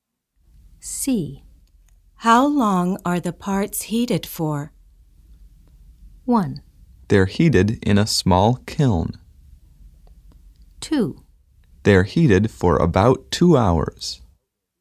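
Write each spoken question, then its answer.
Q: How long are the parts heated for?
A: 2: They're heated for about 2 hours.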